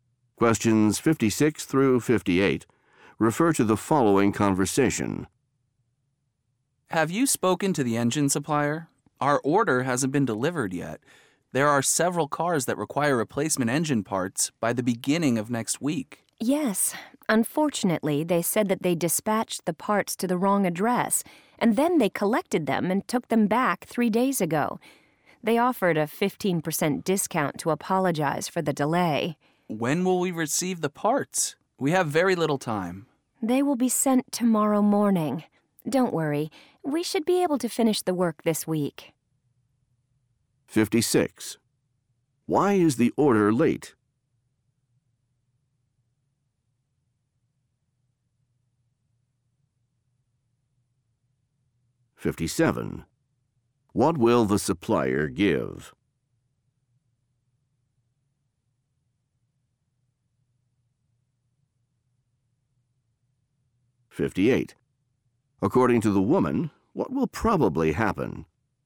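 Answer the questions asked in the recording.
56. It was sent to the wrong address
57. A 15% discount
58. The work will be finished this week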